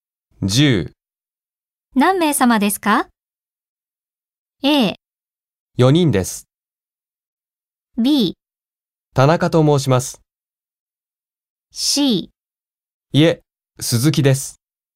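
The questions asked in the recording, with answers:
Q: 何名様ですか?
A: A: 4人です。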